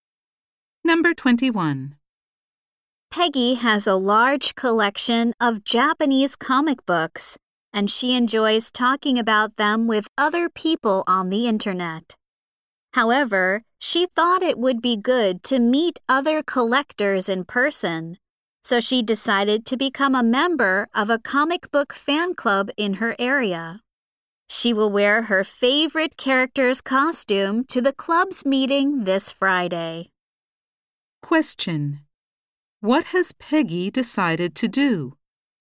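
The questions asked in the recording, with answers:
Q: What has Peggy decided to do?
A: Join a comic book fan club in her area.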